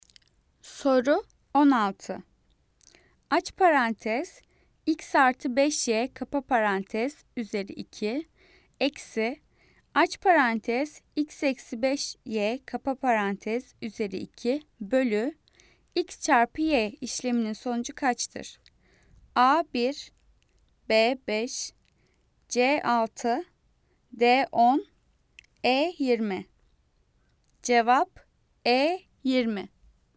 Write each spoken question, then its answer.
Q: Aç parantez x artı 5y kapa parantez üzeri 2 eksi aç parantez x eksi 5y kapa parantez üzeri 2 bölü x çarpı y işleminin sonucu kaçtır?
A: Cevap E 20.